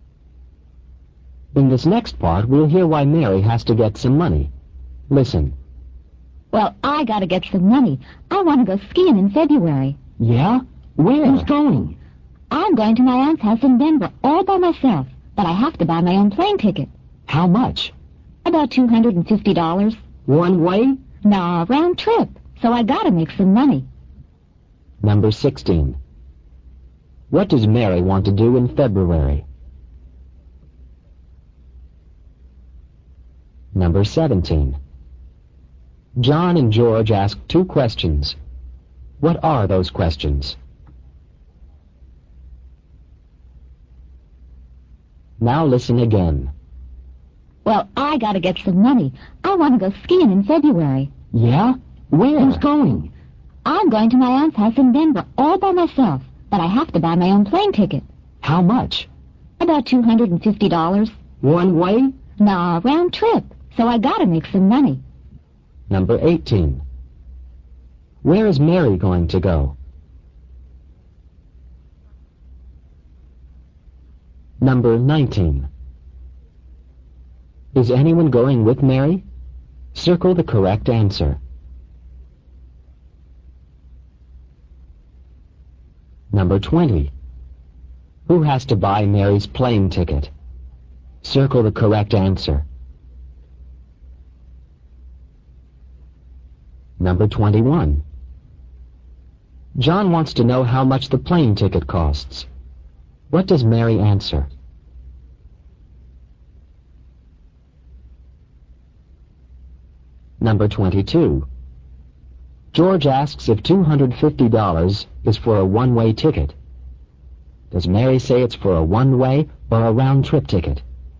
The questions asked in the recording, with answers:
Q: What does Mary want to do in February?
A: She wants to go skiing.

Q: John and George ask two questions. What are those questions?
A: John asks, where? And George asks, who is going?

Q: Where is Mary going to go?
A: She's going to her aunt's, A-U-N-T apostrophe S, in Denver.

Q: Is anyone going with Mary?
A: The answer is B, no.

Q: Who has to buy Mary's plane ticket?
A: The answer is B, Mary does.

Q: What does Mary answer?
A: About $250.

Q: Does Mary say it's for a one-way or a round-trip ticket?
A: You should have circled B, round trip.